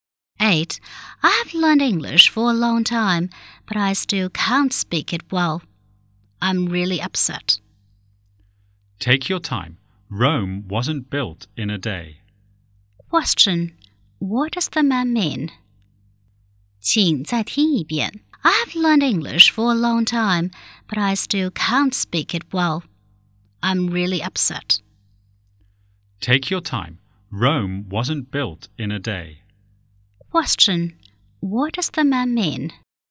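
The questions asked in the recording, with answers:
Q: Question. What does the man mean?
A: Be patient; learning takes time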